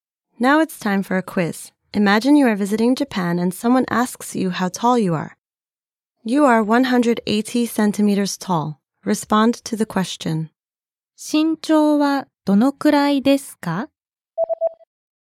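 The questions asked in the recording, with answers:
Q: 身長はどのくらいですか?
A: 180センチです。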